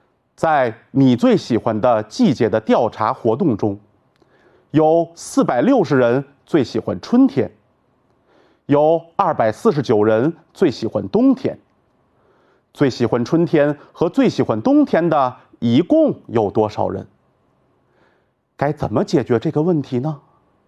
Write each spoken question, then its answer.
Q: 最喜欢春天和最喜欢冬天的一共有多少人?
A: 所以,最喜欢春天的和最喜欢冬天的一共有709人。